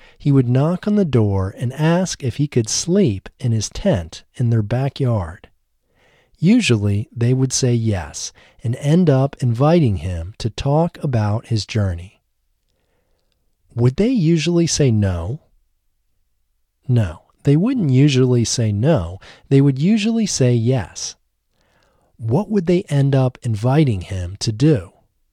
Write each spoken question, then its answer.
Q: What would they end up inviting him to do?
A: They would end up inviting him to talk about his journey.